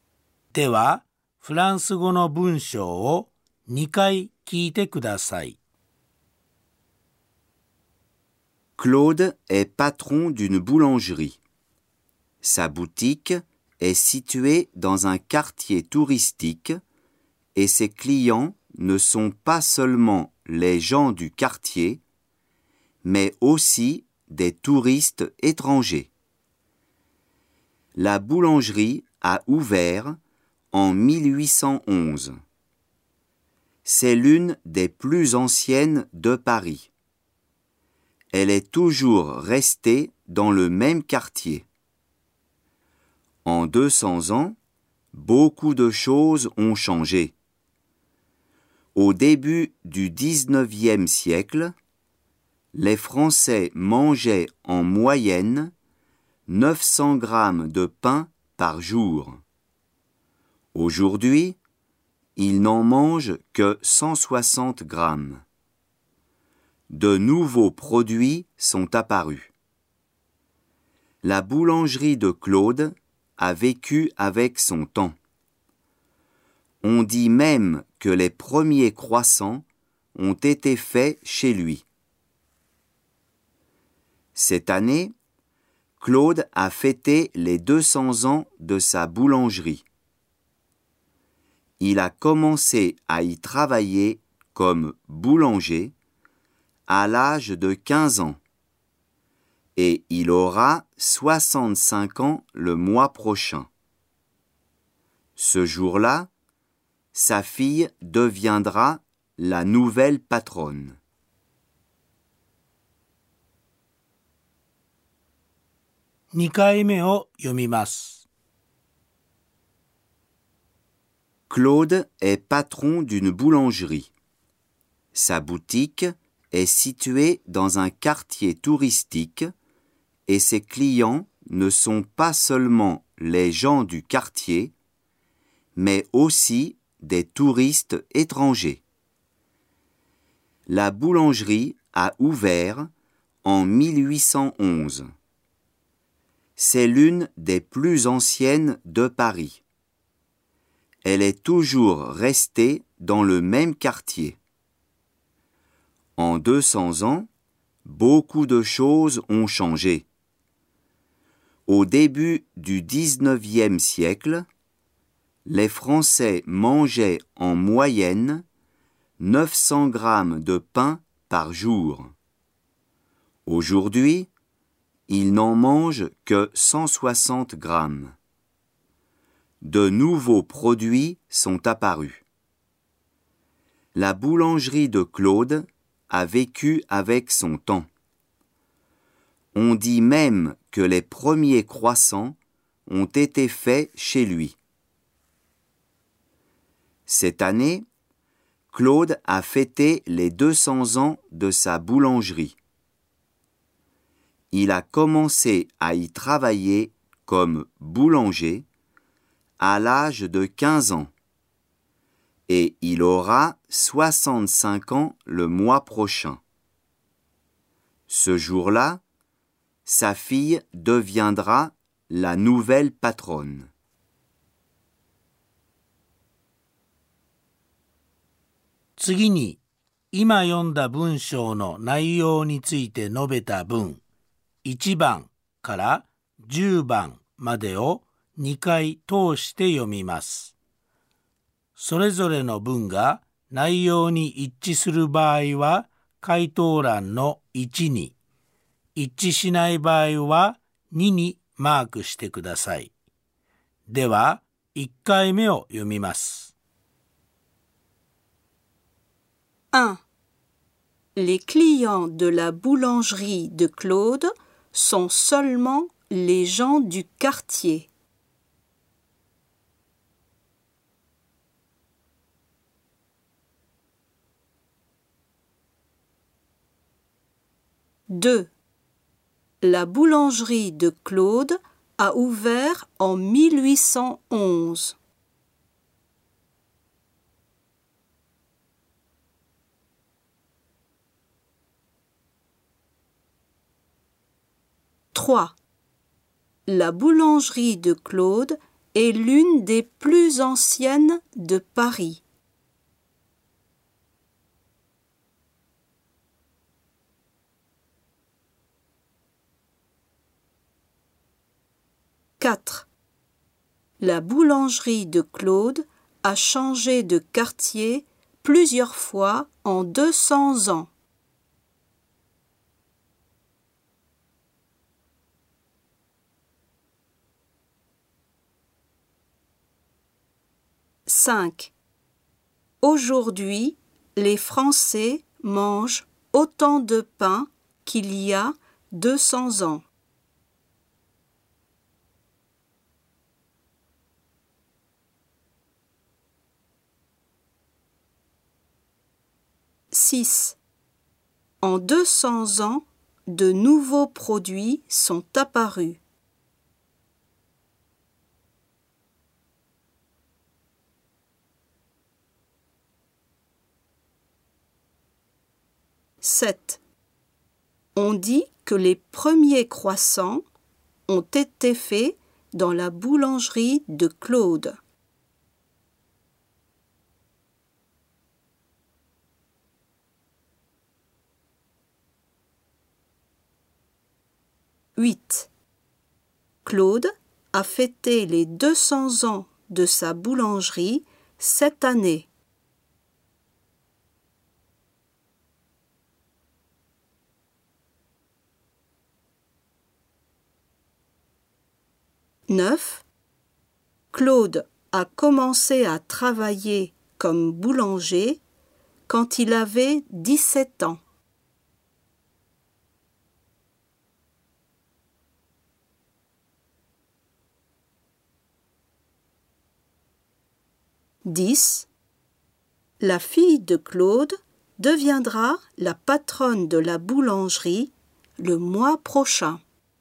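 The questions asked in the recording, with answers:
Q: 1. Les clients de la boulangerie de Claude sont seulement les gens du quartier.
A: Faux

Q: 2. La boulangerie de Claude a ouvert en 1811.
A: Vrai

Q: 3. La boulangerie de Claude est l'une des plus anciennes de Paris.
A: Vrai

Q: 4. La boulangerie de Claude a changé de quartier plusieurs fois en 200 ans.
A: Faux

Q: Aujourd'hui, les Français mangent autant de pain qu'il y a 200 ans.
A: Faux

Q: 6. En 200 ans, de nouveaux produits sont apparus.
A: Vrai

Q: On dit que les premiers croissants ont été faits dans la boulangerie de Claude.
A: Vrai

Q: 8. Claude a fêté les 200 ans de sa boulangerie cette année.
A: Vrai

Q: Claude a commencé à travailler comme boulanger quand il avait 17 ans.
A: Faux

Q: 10. La fille de Claude deviendra la patronne de la boulangerie le mois prochain.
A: Vrai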